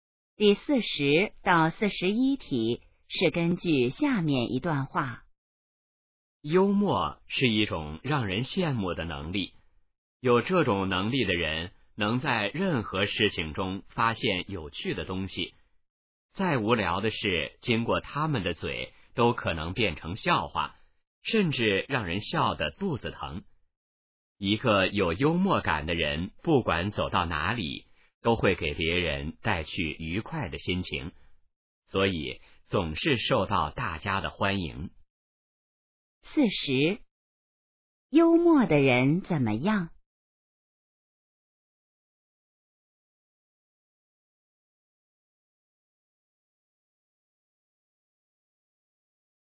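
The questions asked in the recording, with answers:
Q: 幽默的人怎么样?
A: 能在任何事情中发现有趣的东西

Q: 幽默的人为什么受欢迎?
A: 给别人带去愉快的心情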